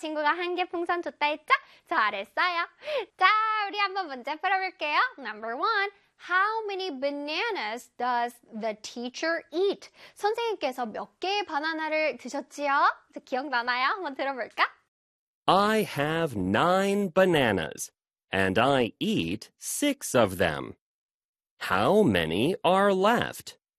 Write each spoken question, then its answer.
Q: Number one, how many bananas does the teacher eat?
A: 여섯 개를 드셨다고 하죠. 그래서 정답은 3, 6, 9 중에 6가 되겠지요.